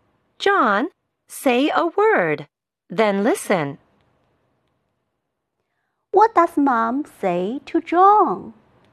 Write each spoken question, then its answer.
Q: What does Mom say to John?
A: Mom said, John, say a word, then listen.